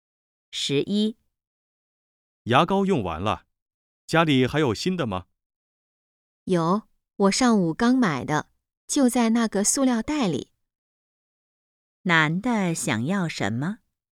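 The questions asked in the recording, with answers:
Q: 男的想要什么?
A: 牙膏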